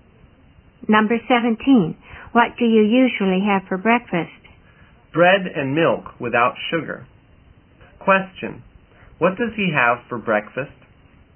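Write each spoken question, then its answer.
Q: What does he have for breakfast?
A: Bread and milk without sugar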